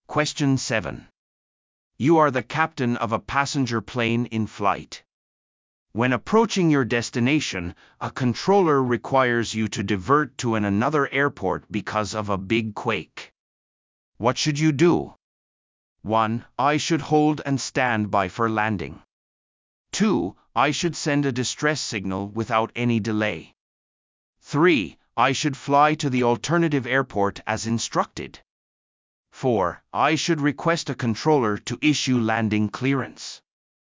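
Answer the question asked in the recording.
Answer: 3: I should fly to the alternative airport as instructed.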